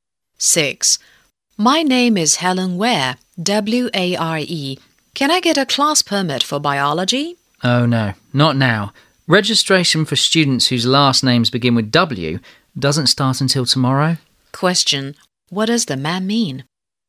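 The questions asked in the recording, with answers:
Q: What does the man mean?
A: Helen must come back tomorrow to register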